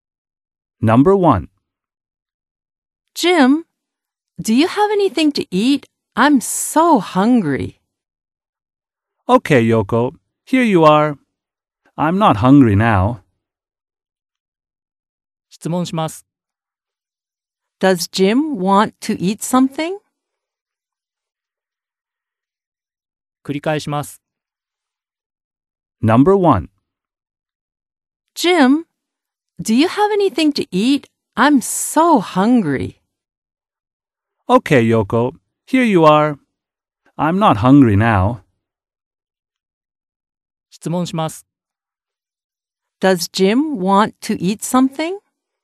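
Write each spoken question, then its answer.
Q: Does Jim want to eat something?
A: No, he doesn't.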